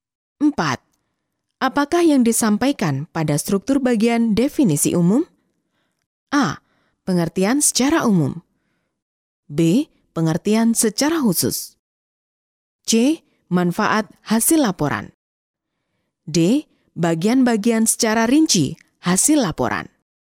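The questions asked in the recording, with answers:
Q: Apakah yang disampaikan pada struktur bagian definisi umum?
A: A: Pengertian secara umum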